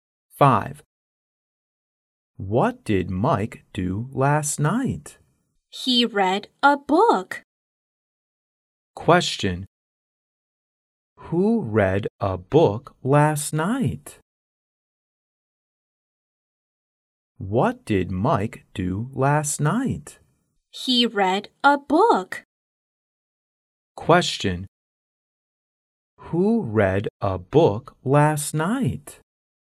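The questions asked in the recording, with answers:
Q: Who read a book last night?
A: Mike.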